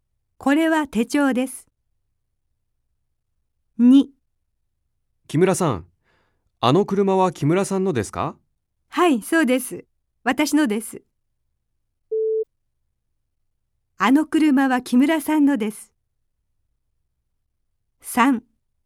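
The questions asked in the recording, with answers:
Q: あの車は木村さんのです。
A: はい(○)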